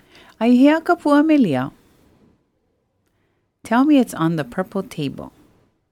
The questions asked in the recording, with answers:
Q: Aihea kapua melia.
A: Aia ka lei pua me lia ma ke pākau kau poni.